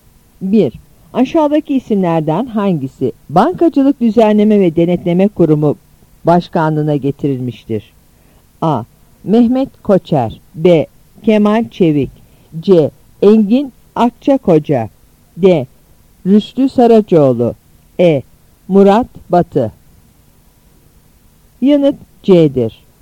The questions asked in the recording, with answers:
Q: Aşağıdaki isimlerden hangisi Bankacılık Düzenleme ve Denetleme Kurumu Başkanlığına getirilmiştir?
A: Yanıt C'dir.